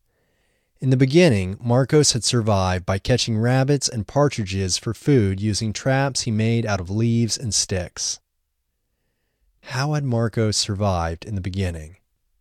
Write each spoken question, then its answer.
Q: How had Marcos survived in the beginning?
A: Marcos had survived in the beginning by catching rabbits and partridges for food.